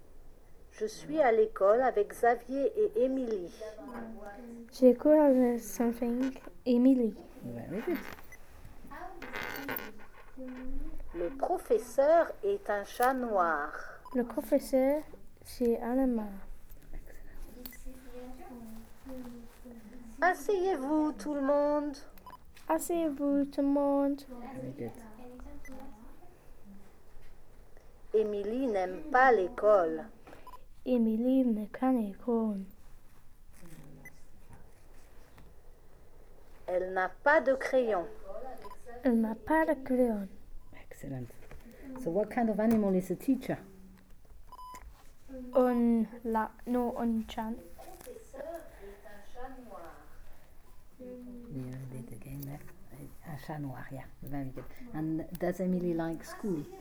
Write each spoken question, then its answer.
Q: And does Émilie like school?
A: Nope.